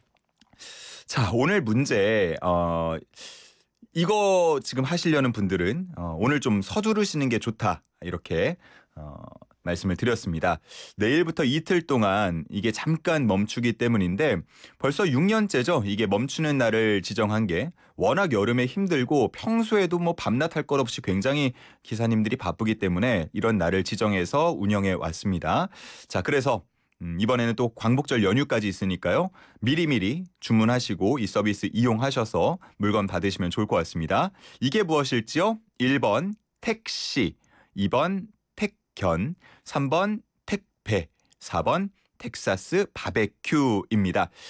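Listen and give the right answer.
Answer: 3: 택배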